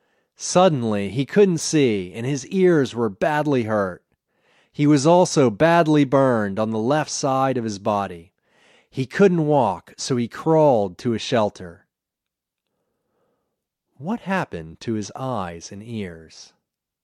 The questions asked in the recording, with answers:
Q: What happened to his eyes and ears?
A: He couldn't see and his ears were badly hurt.